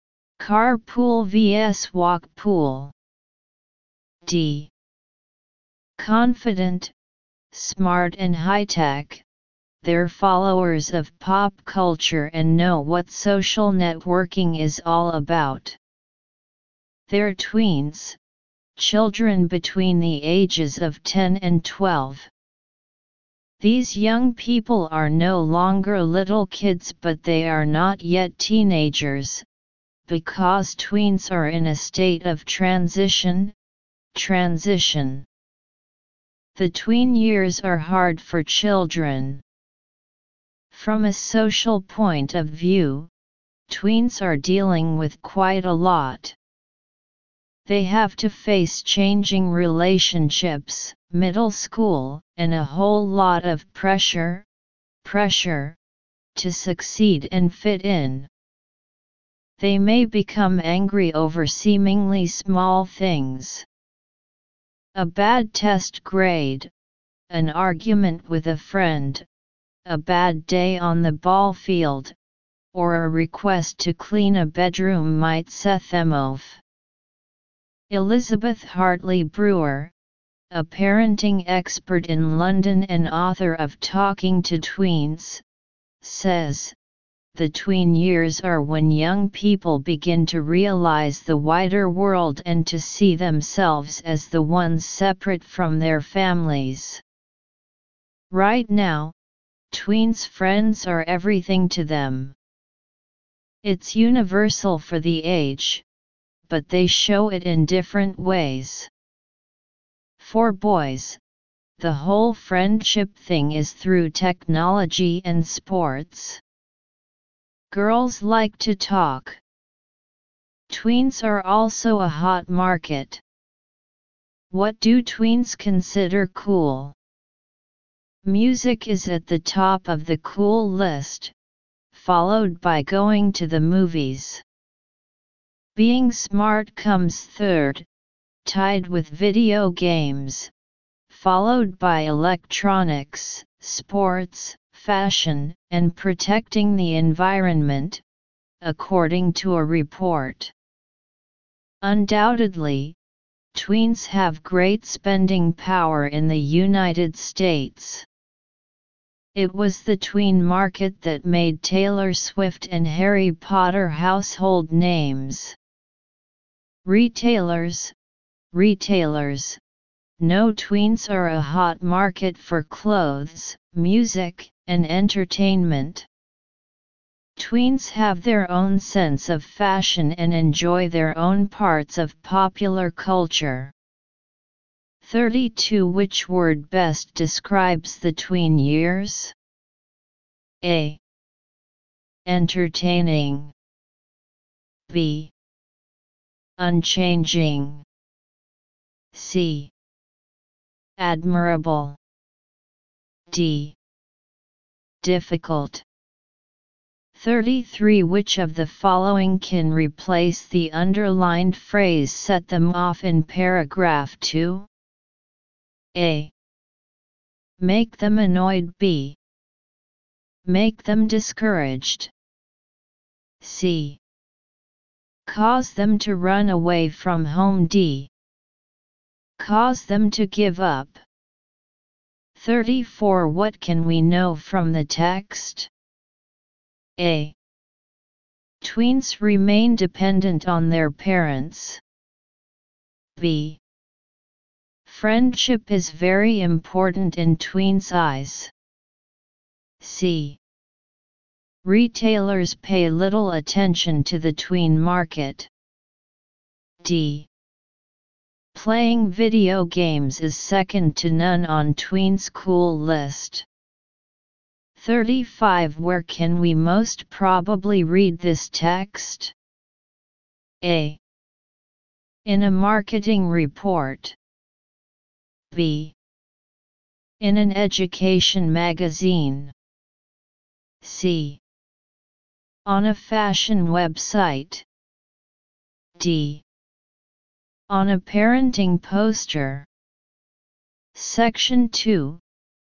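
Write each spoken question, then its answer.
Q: Which word best describes the tween years?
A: D: Difficult.

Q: Which of the following can replace the underlined phrase set them off in paragraph 2?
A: A: Make them annoyed

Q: What can we know from the text?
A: B: Friendship is very important in tweens' eyes.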